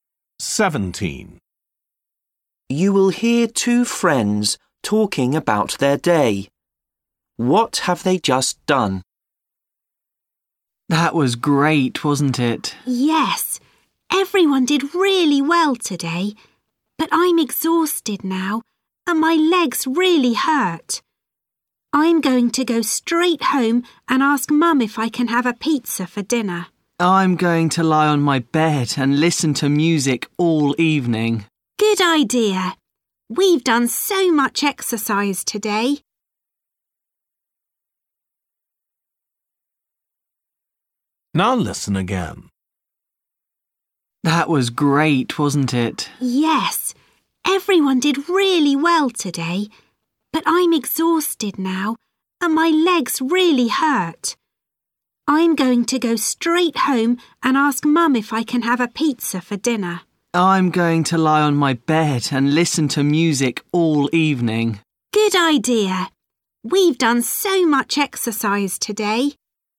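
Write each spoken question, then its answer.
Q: What have they just done?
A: Done a lot of exercise (sport)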